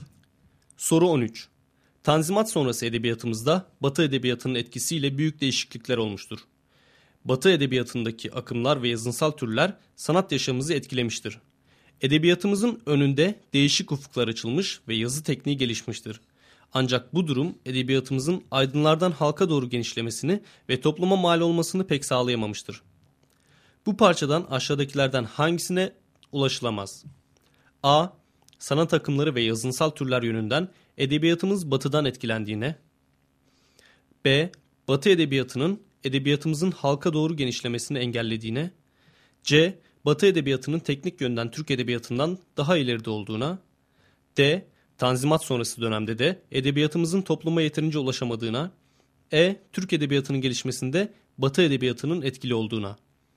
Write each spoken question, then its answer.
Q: Bu parçadan aşağıdakilerden hangisine ulaşılamaz?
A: Doğru cevap B şıkkı.